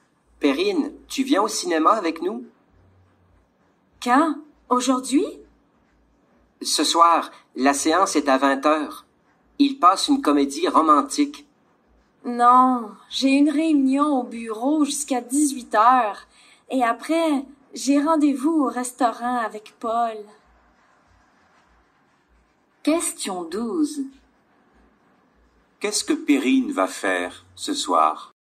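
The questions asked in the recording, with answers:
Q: Qu'est-ce que Perrine va faire ce soir?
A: Elle va au restaurant avec Paul.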